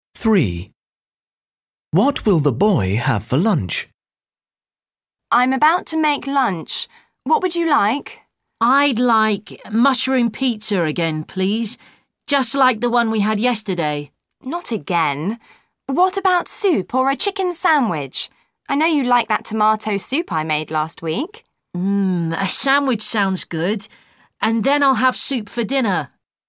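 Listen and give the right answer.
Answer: A chicken sandwich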